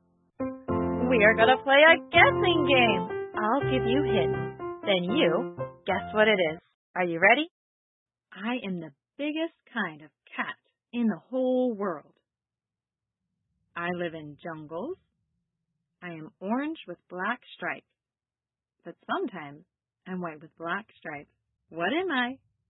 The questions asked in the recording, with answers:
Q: What am I?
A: Tiger.